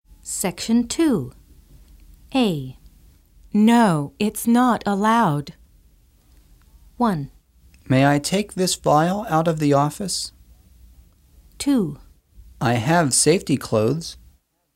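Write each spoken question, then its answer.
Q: No, it's not allowed.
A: 1: May I take this vial out of the office?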